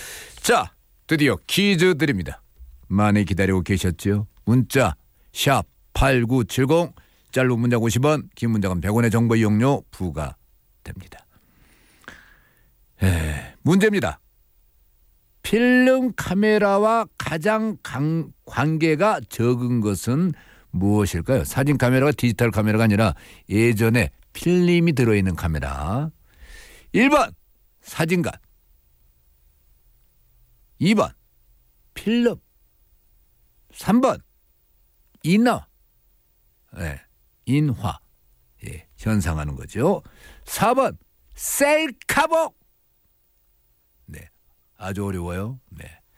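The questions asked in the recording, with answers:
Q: 필름 카메라와 가장 관계가 적은 것은 무엇일까요?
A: 4: 셀카봉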